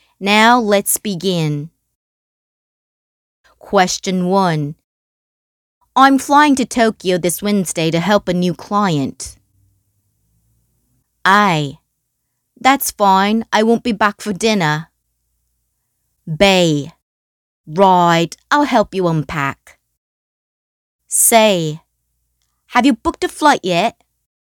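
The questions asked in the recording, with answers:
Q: I'm flying to Tokyo this Wednesday to help a new client.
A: C: have you booked a flight yet?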